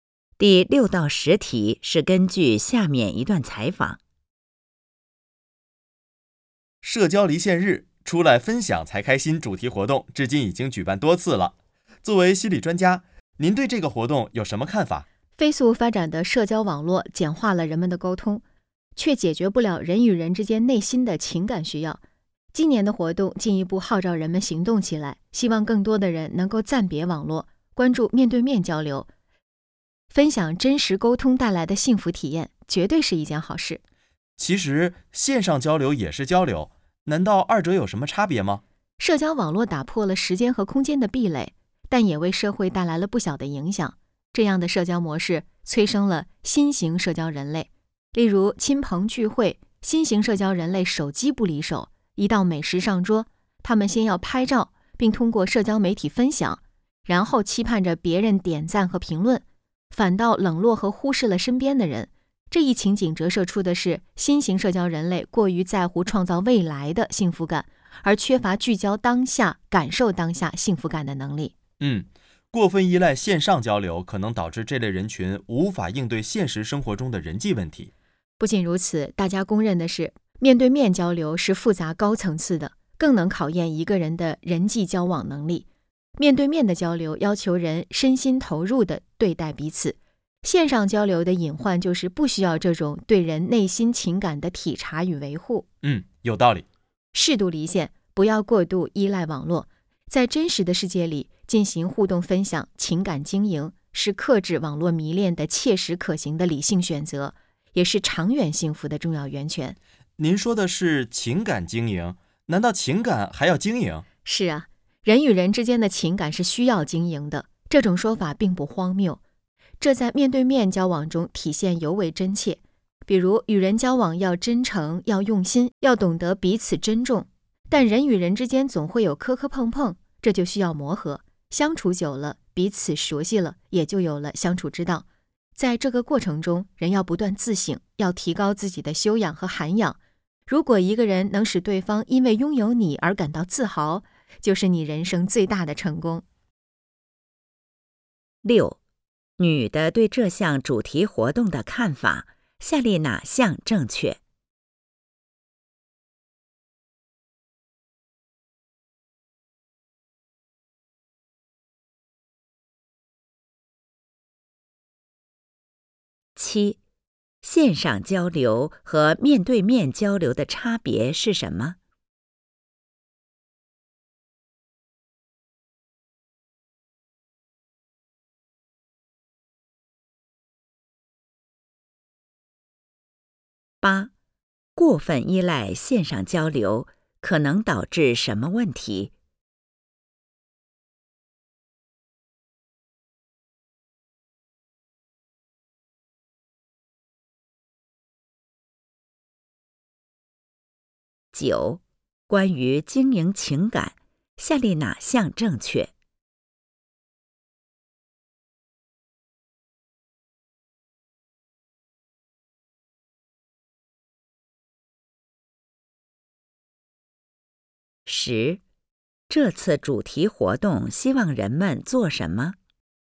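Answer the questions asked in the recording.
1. 面对面交流要求身心投入,体察和维护对方内心情感,线上交流不需要
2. 无法应对现实生活中的人际问题
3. 暂别网络,面对面交流,分享真实沟通带来的幸福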